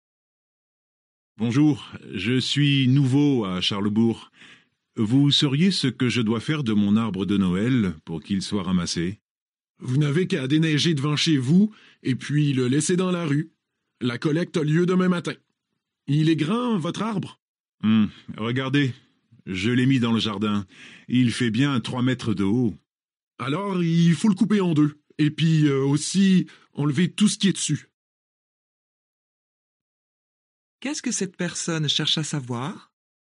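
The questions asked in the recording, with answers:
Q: Qu'est-ce que cette personne cherche à savoir ?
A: Ce qu'elle doit faire de son arbre de Noël pour qu'il soit ramassé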